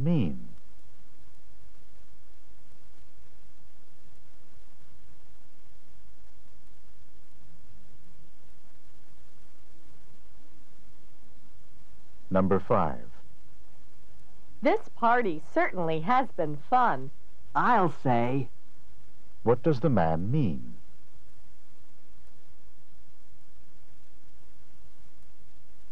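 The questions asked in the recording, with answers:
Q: What does the man mean?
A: He agrees that the party has been fun.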